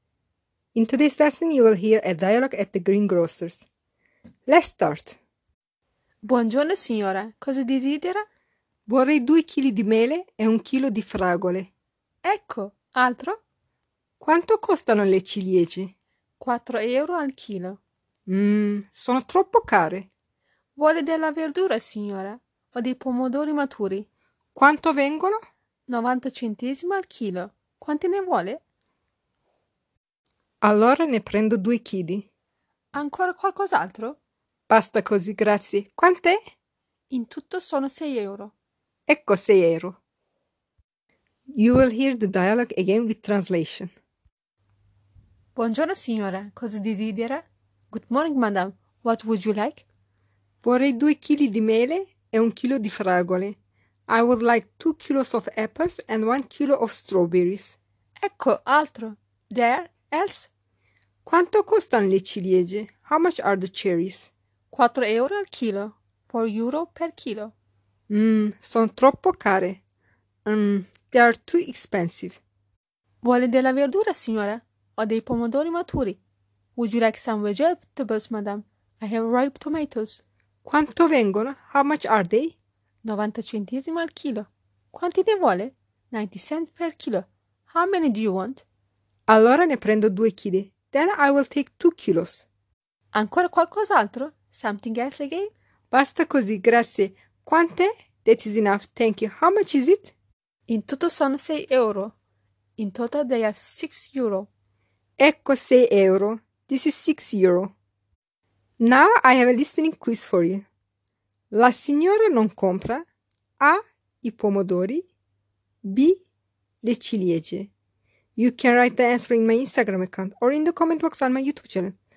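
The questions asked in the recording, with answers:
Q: La signora non compra A. I pomodori B. Le ciliegie.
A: B: Le ciliegie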